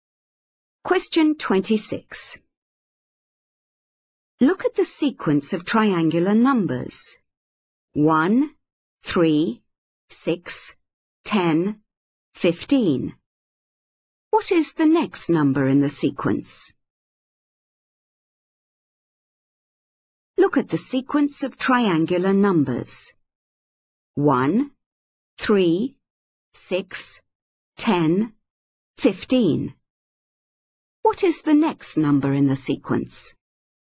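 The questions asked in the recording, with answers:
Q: What is the next number in the sequence?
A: 21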